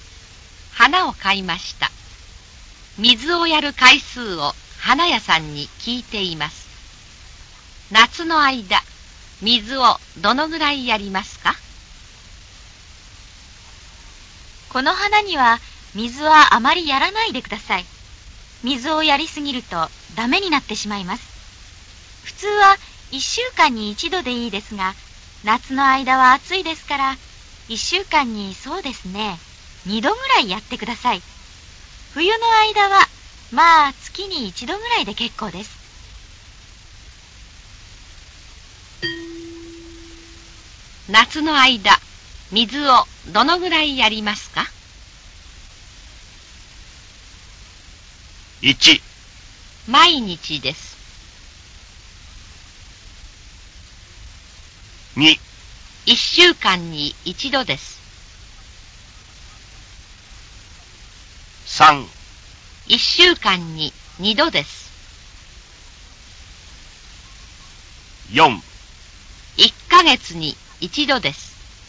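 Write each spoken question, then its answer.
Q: 夏の間、水をどのぐらいやりますか?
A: 3: 1週間に2度です。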